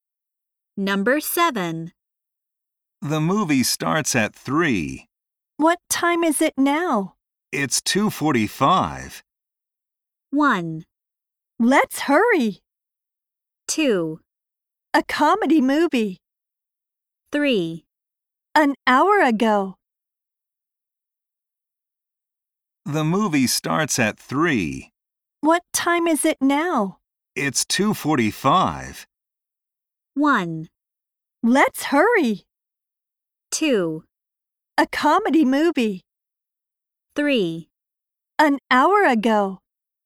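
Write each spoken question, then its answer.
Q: It's 2:45.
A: 1: Let's hurry.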